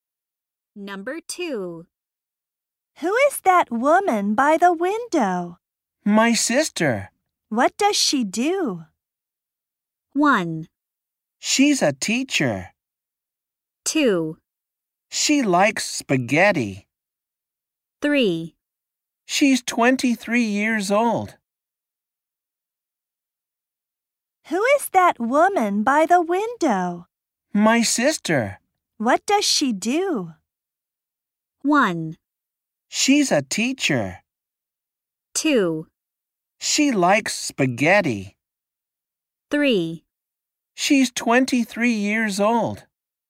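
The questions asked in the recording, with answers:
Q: What does she do?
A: 1: She's a teacher.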